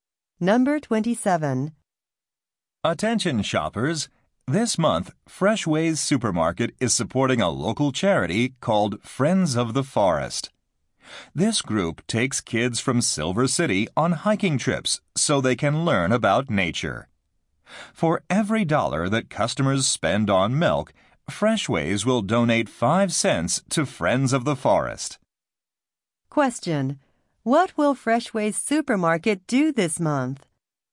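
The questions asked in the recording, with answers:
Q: What will Freshways Supermarket do this month?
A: Donate 5 cents per dollar spent on milk to a charity.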